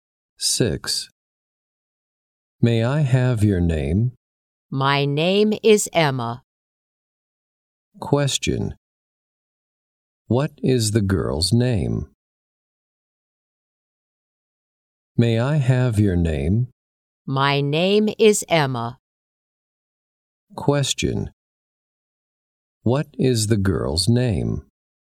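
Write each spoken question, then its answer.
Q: What is the girl's name?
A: Emma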